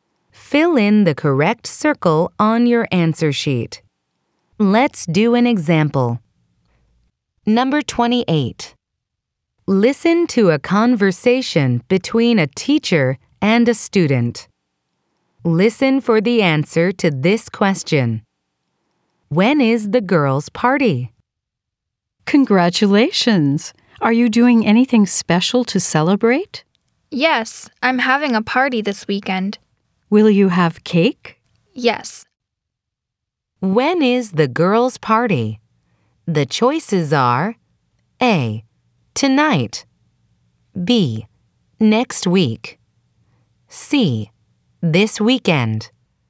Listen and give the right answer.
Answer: The answer is C, because the girl says, "Yes, I'm having a party this weekend."